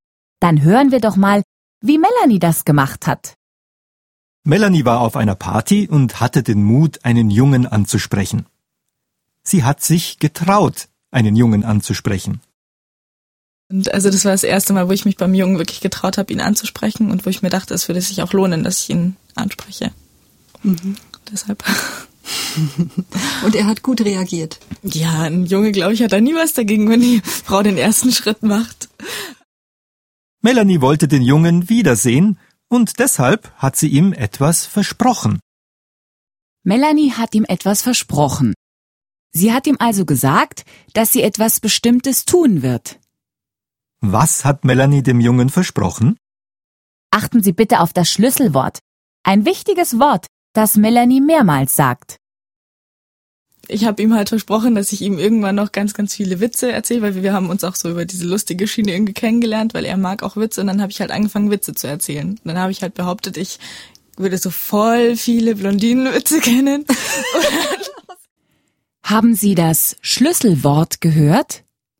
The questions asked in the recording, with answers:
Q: Was hat Melanie dem Jungen versprochen?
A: Melanie hat dem Jungen versprochen, ihm ganz viele Blondinenwitze zu erzählen.